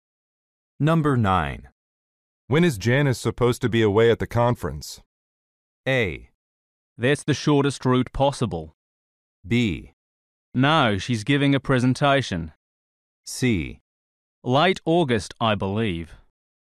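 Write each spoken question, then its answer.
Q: When is Janice supposed to be away at the conference?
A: C: Late August, I believe.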